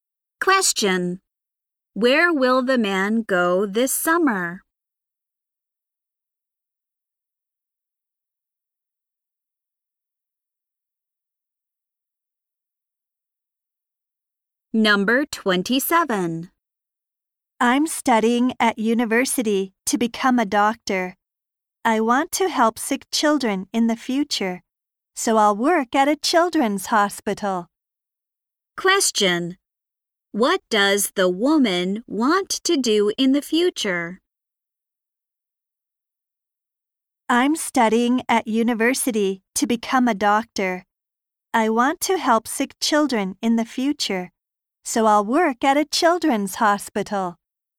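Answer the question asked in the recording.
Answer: Help sick children as a doctor at a children's hospital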